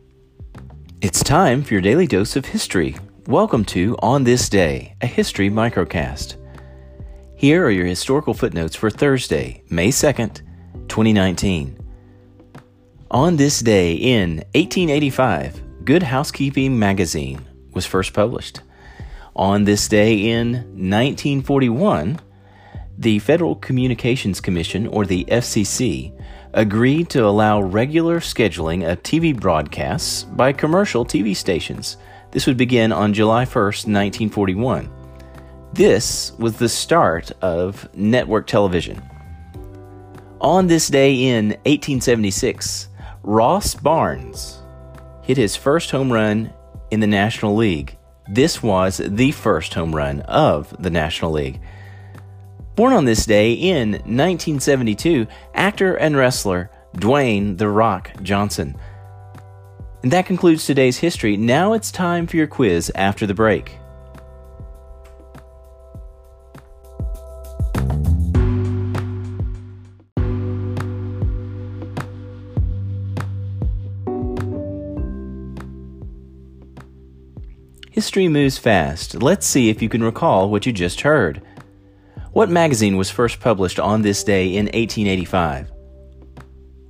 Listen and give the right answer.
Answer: Answer Good Housekeeping Magazine.